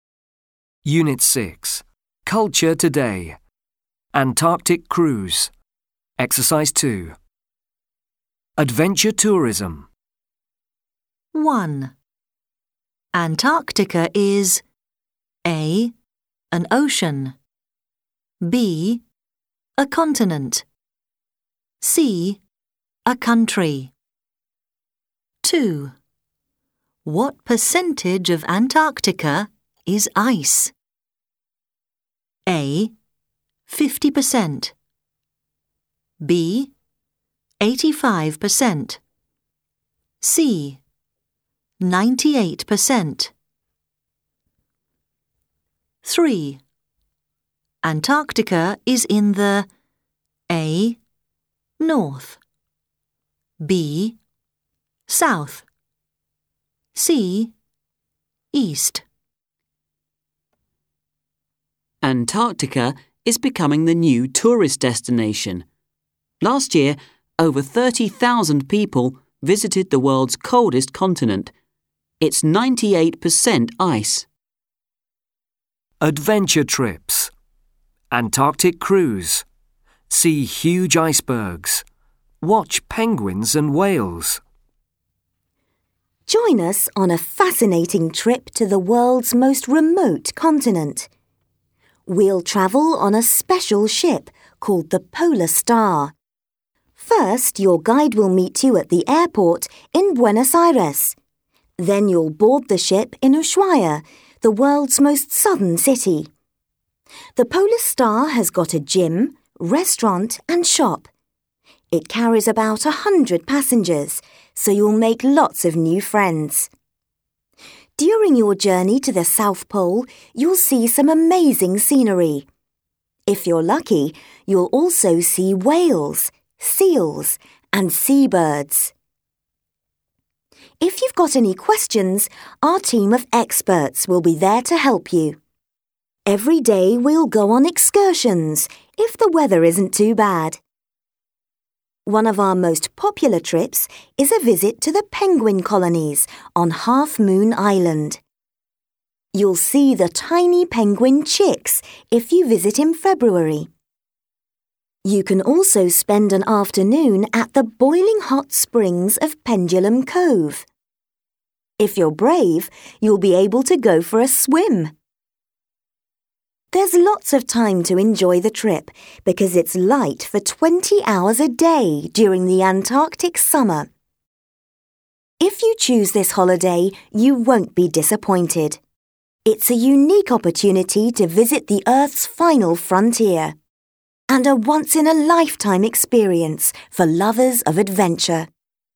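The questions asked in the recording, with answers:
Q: Antarctica is A. an ocean. B. a continent. C. a country.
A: B: a continent

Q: What percentage of Antarctica is ice?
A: C: 98%

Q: Antarctica is in the A. North. B. South. C. East.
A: B: South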